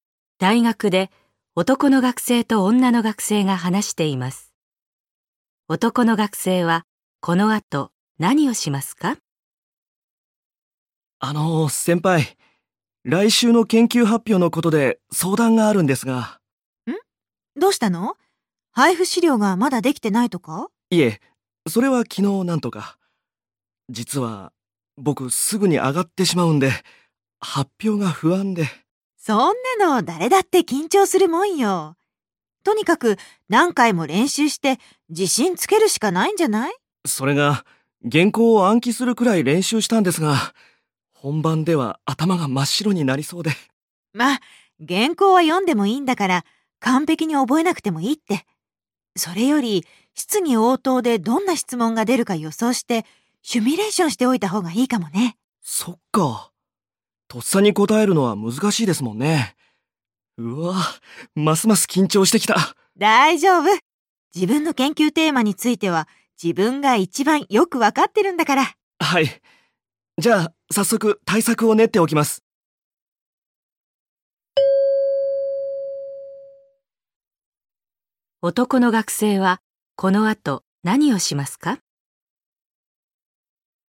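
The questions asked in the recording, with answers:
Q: 男の学生はこの後何をしますか?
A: 質疑応答でどんな質問が出るか予想して練習する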